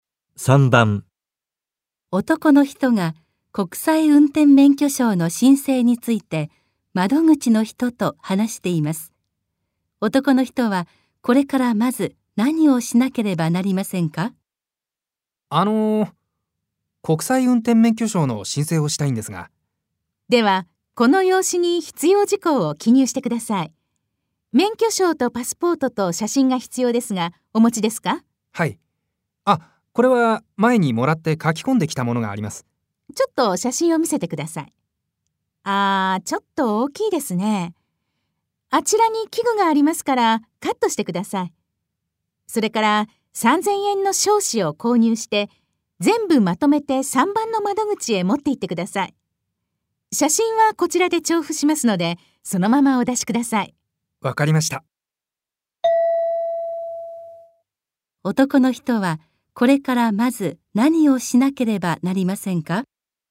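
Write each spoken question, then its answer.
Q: 男の人はこれからまず何をしなければなりませんか?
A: 写真を小さくカットする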